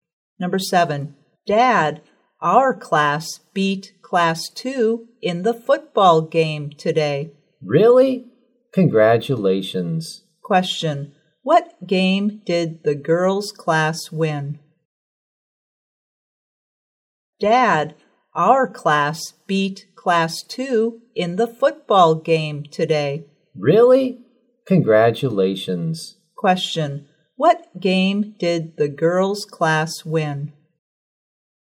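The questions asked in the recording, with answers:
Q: what game did the girls' class win?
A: A football game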